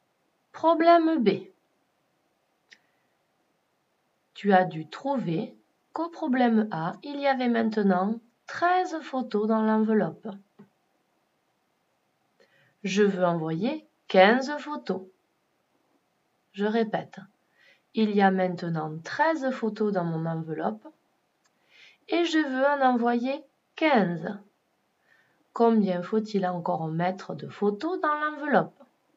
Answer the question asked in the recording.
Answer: Il faut encore mettre 2 photos dans mon enveloppe pour en avoir 15.